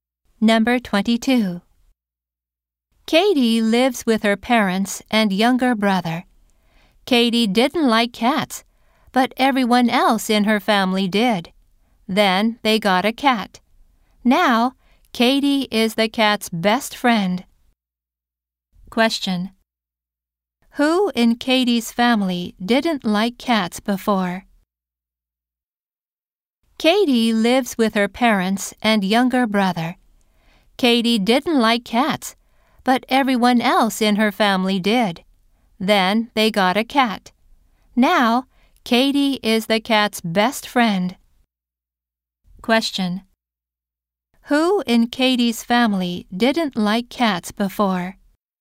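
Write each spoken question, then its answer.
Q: Who in Katie's family didn't like cats before?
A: Katie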